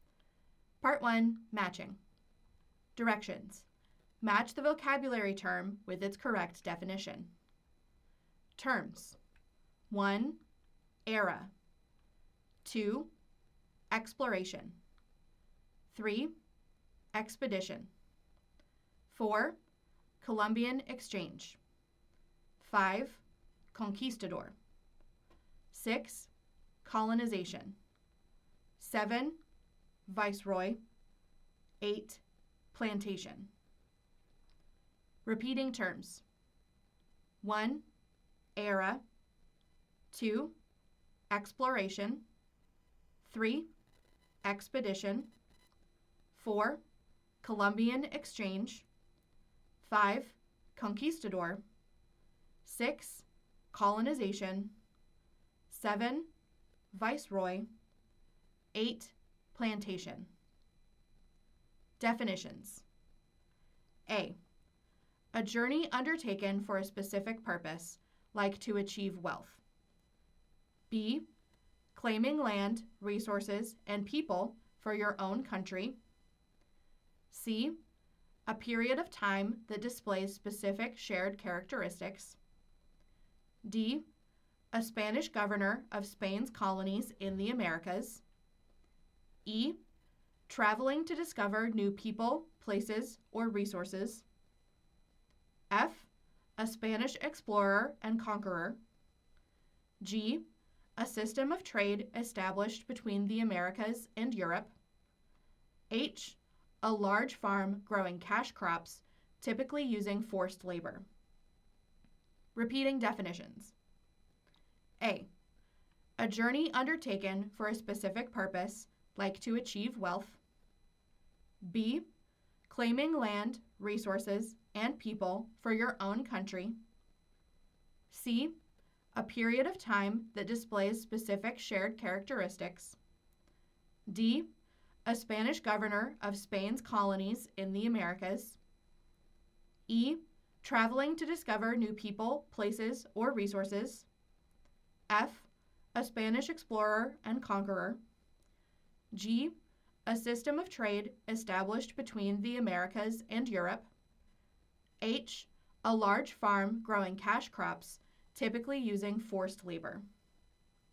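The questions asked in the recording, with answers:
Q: Exploration.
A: E: Traveling to discover new people, places, or resources.

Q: Expedition.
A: A: A journey undertaken for a specific purpose, like to achieve wealth.

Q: Columbian Exchange.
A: G: A system of trade established between the Americas and Europe.

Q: Conquistador.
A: F: A Spanish explorer and conqueror.

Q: Colonization.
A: B: Claiming land, resources, and people for your own country.

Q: Viceroy.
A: D: A Spanish governor of Spain's colonies in the Americas.

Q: Plantation.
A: H: A large farm growing cash crops, typically using forced labor.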